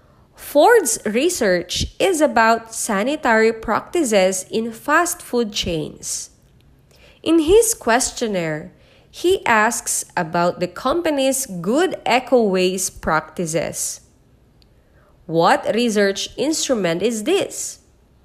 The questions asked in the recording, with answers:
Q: What research instrument is this?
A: The correct answer is letter A, survey.